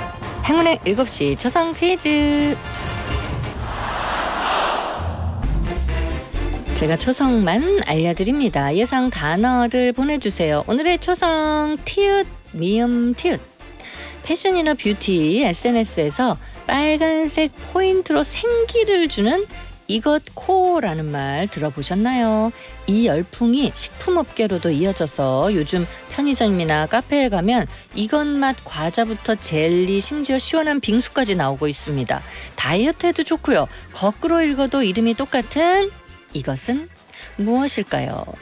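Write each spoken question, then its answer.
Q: 거꾸로 읽어도 이름이 똑같은 이것은 무엇일까요?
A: 토마토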